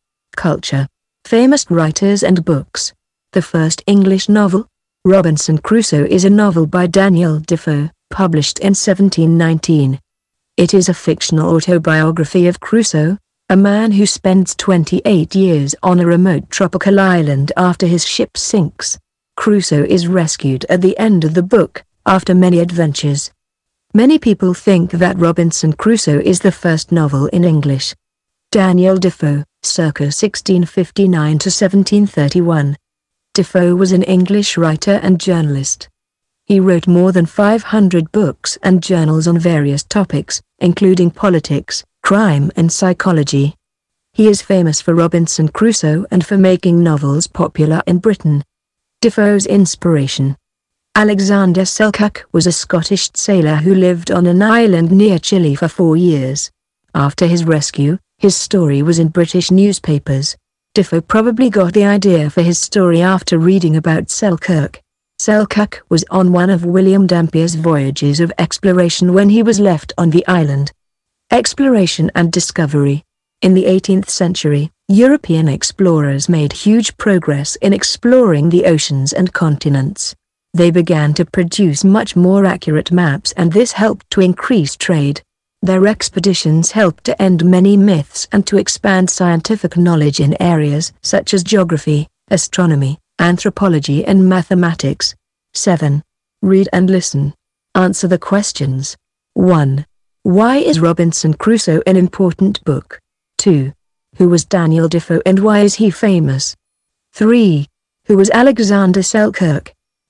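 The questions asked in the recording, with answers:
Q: Why is Robinson Crusoe an important book?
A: Many people think it is the first novel in English.

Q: Who was Daniel Defoe and why is he famous?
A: An English writer and journalist, famous for Robinson Crusoe and for making novels popular in Britain.

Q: Who was Alexander Selkirk?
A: A Scottish sailor who lived on an island near Chile for 4 years.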